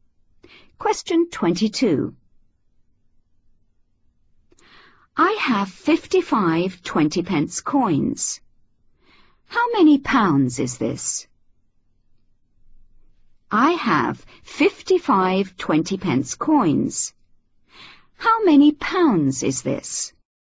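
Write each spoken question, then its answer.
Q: How many pounds is this?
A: £11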